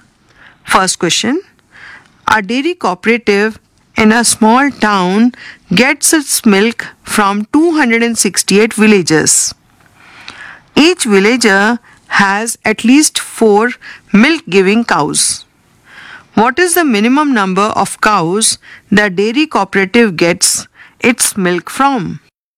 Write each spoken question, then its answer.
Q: What is the minimum number of cows the dairy cooperative gets its milk from?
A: 800 plus 240 plus 32, which is equal to 1072